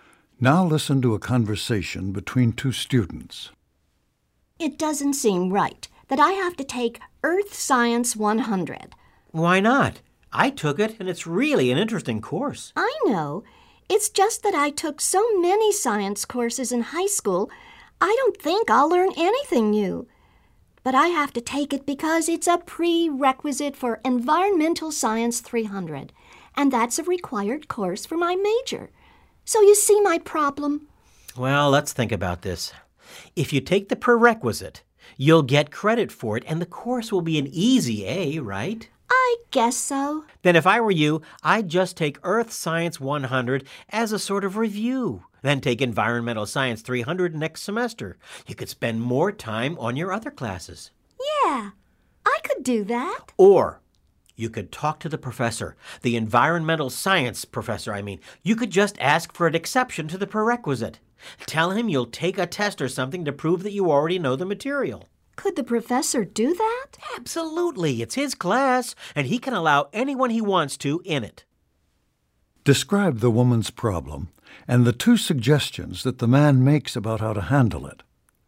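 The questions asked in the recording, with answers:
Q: Describe the woman's problem and the two suggestions that the man makes about how to handle it.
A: She has to take Earth Science 100, a prerequisite for a required course, even though she already knows the material. He suggests taking it anyway as an easy review, or asking the professor for an exception, perhaps by taking a test.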